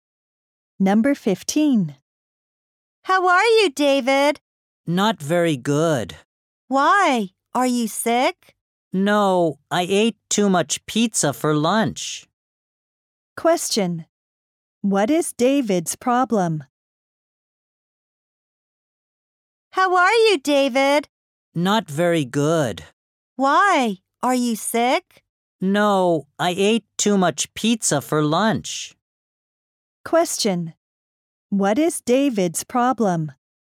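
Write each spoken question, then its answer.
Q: What is David's problem?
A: He ate too much pizza for lunch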